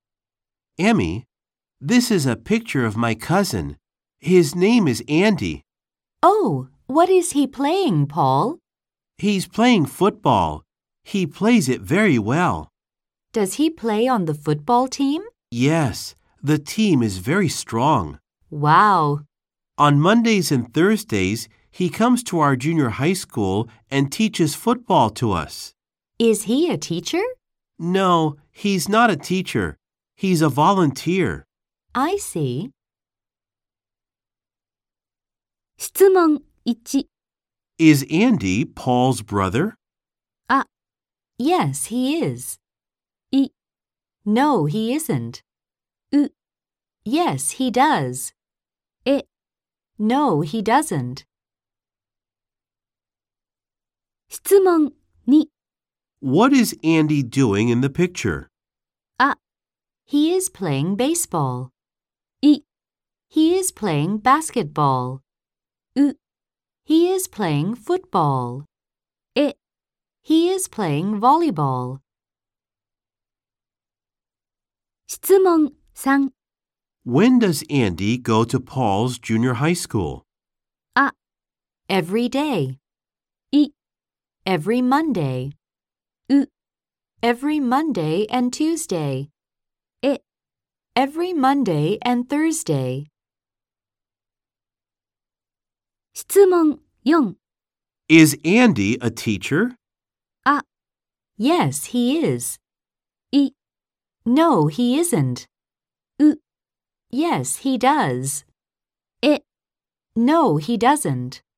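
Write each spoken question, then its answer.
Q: Is Andy Paul's brother?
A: イ: No, he isn't.

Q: What is Andy doing in the picture?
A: ウ: He is playing football.

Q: When does Andy go to Paul's junior high school?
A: エ: Every Monday and Thursday.

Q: Is Andy a teacher?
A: イ: No, he isn't.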